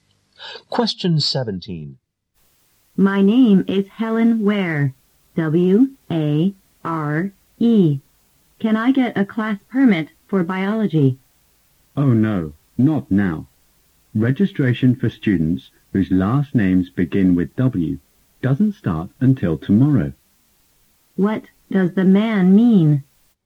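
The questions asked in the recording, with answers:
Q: What does the man mean?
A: Helen must register tomorrow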